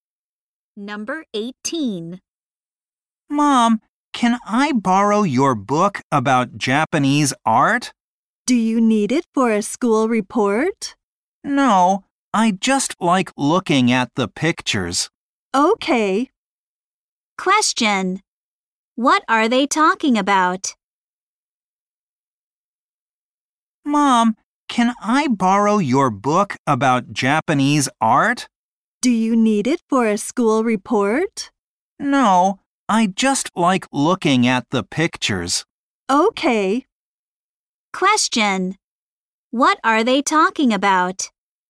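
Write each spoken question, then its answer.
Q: Question. What are they talking about?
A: A book about Japanese art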